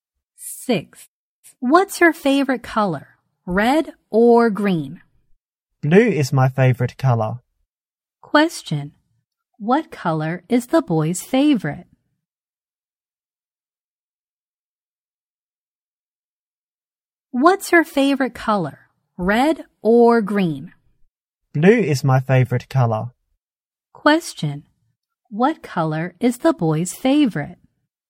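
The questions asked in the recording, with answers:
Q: Question. What color is the boy's favorite?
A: Blue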